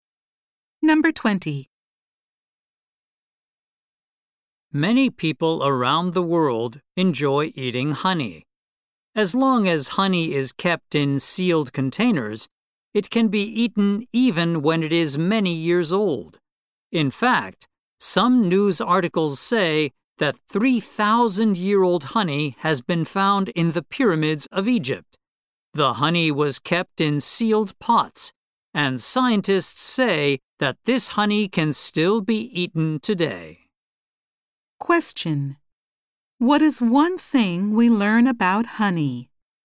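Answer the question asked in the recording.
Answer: Honey in sealed containers can be eaten even when many years old.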